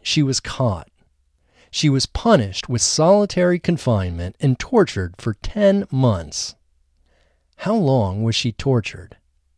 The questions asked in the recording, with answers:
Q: How long was she tortured?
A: She was tortured for 10 months.